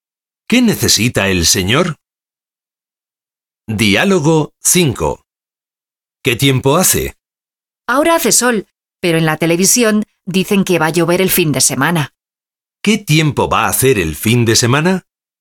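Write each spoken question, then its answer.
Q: ¿Qué tiempo va a hacer el fin de semana?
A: Va a llover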